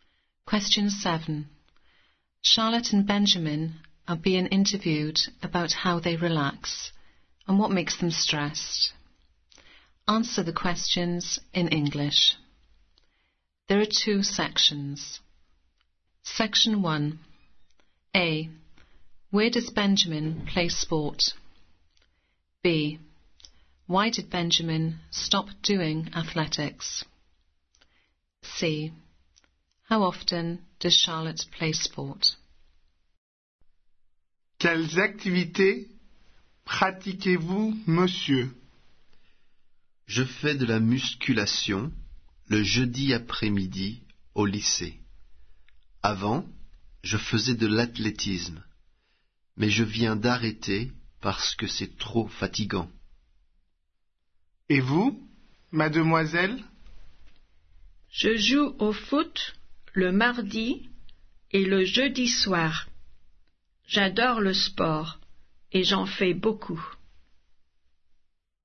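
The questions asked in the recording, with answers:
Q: Where does Benjamin play sport?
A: at school (lycée)

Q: Why did Benjamin stop doing athletics?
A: it was too tiring

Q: How often does Charlotte play sport?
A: twice a week (Tuesday and Thursday evenings)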